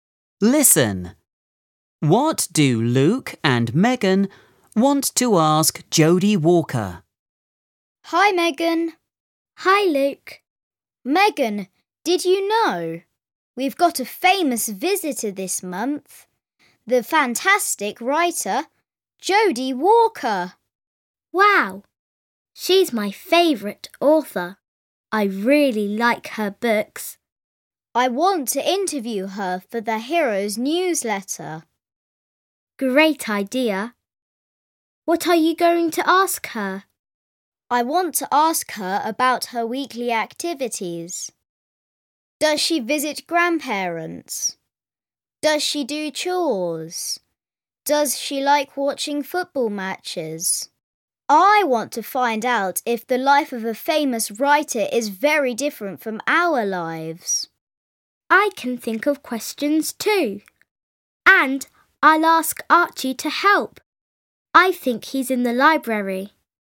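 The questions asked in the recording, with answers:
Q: What do Luke and Megan want to ask Jodie Walker?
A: About her weekly activities, e.g. if she visits grandparents, does chores, likes watching football matches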